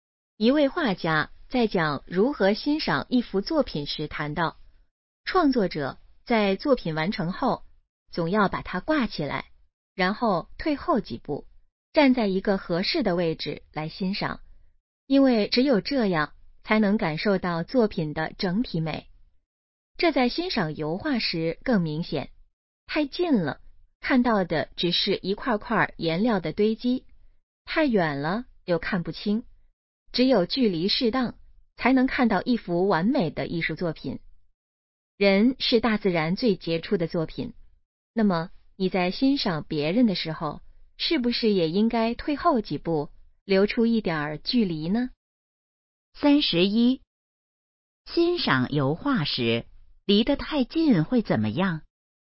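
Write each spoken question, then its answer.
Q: 欣赏油画时离得太近会怎么样?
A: 只看到一块块颜料的堆积

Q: 这段话主要想告诉我们什么?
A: 欣赏别人时要保持一点距离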